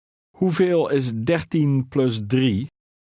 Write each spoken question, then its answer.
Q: Hoeveel is 13 plus 3?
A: 16.